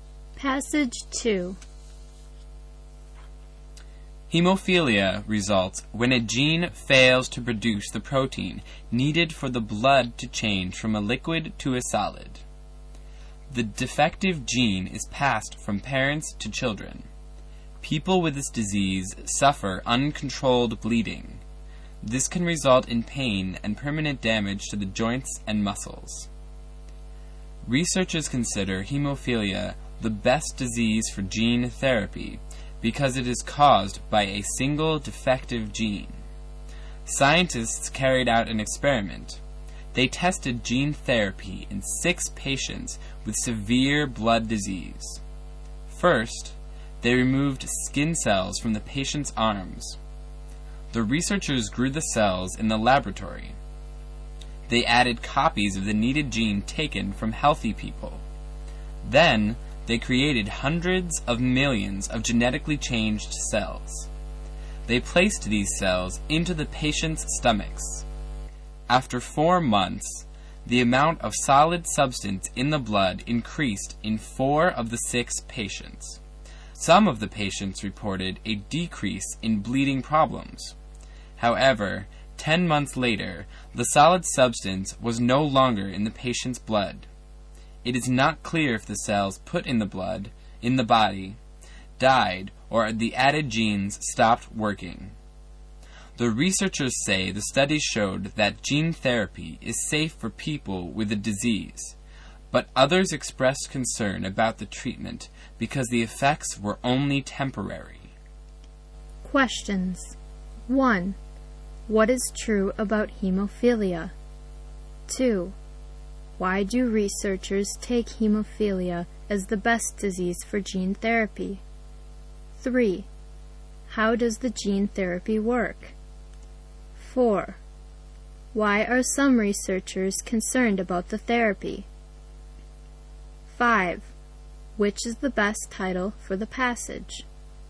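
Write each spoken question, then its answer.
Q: Why do researchers take hemophilia as the best disease for gene therapy?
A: Because it is caused by a single defective gene

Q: How does the gene therapy work?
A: Skin cells are removed, given copies of the healthy gene, grown in the lab, and put back into the patients

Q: Why are some researchers concerned about the therapy?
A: Because its effects were only temporary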